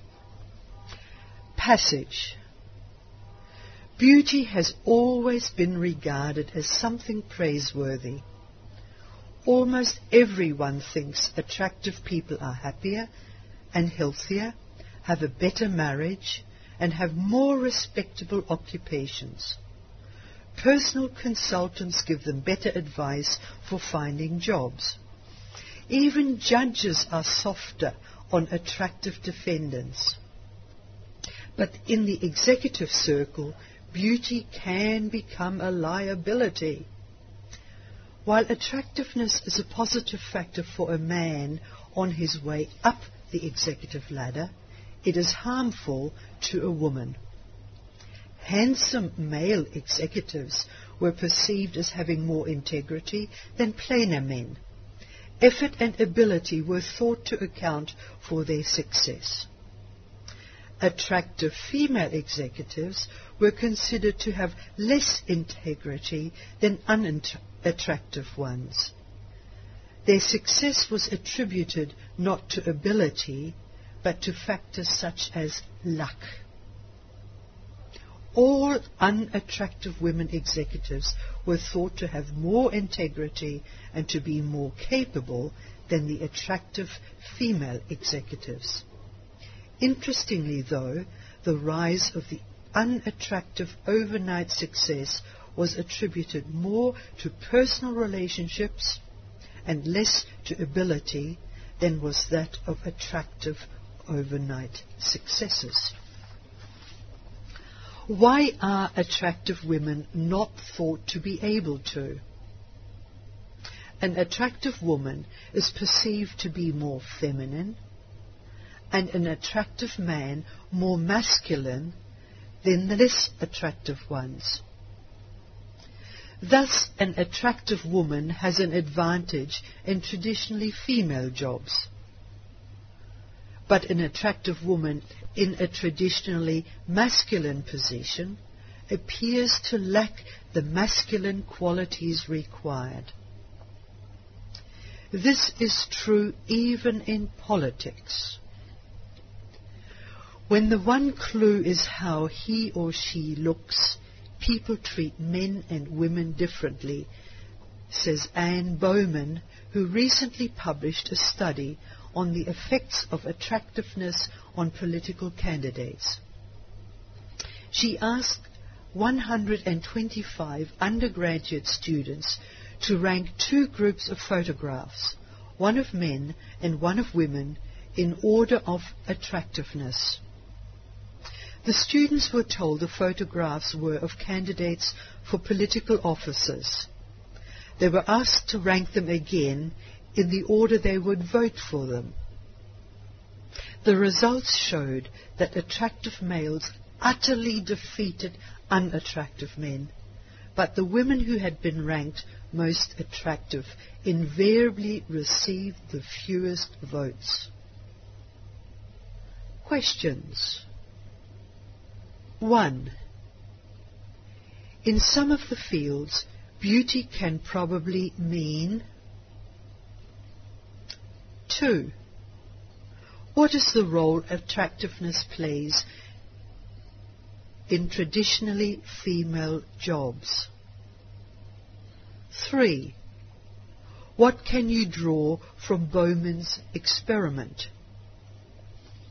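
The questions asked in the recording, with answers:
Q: In some of the fields, beauty can probably mean...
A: a liability

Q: What is the role attractiveness plays in traditionally female jobs?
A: It gives an attractive woman an advantage

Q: What can you draw from Bowman's experiment?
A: People judge men and women differently by looks: attractive men win votes, attractive women get the fewest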